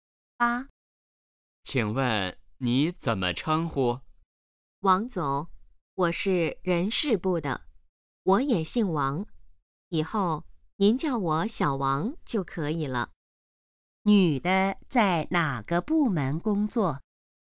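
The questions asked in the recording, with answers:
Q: 女的在哪个部门工作?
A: 人事部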